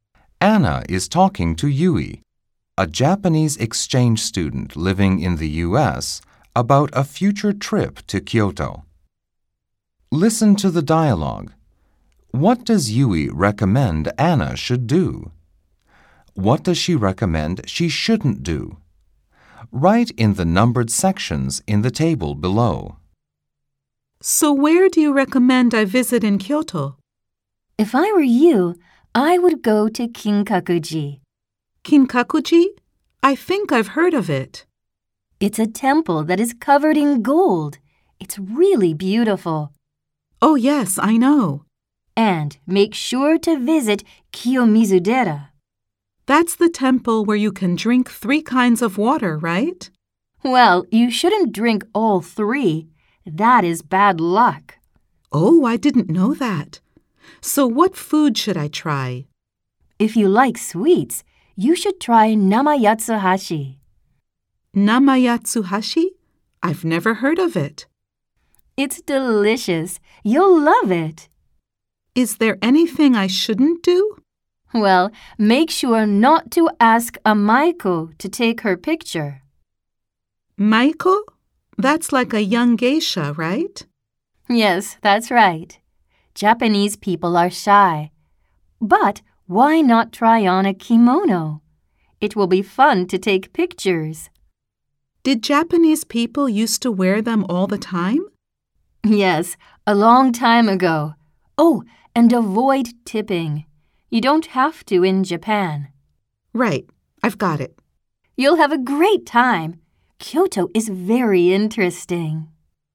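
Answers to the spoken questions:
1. Visit Kinkakuji and Kiyomizu-dera, try Namayatsuhashi, and try on a kimono
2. Drink all 3 waters at Kiyomizu-dera, ask a Maiko to take her picture, or tip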